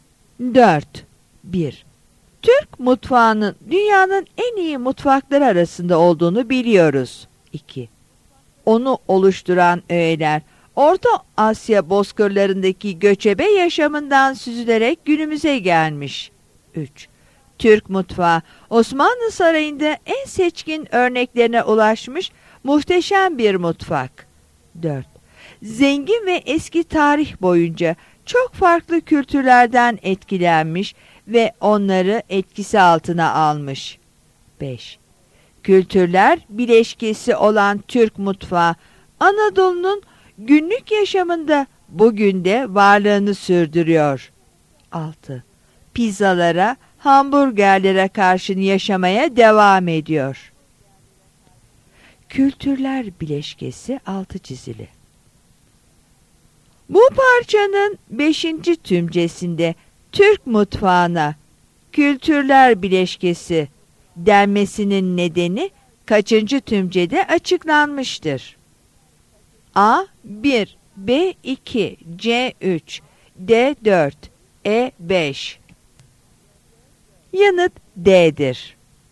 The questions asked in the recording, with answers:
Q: Bu parçanın 5. tümcesinde Türk mutfağına kültürler bileşkesi denmesinin nedeni kaçıncı tümcede açıklanmıştır?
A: Yanıt D'dir.